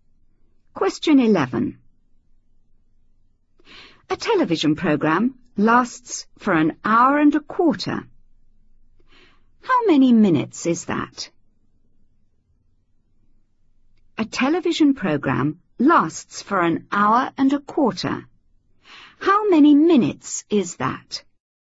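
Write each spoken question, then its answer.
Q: How many minutes is that?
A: 75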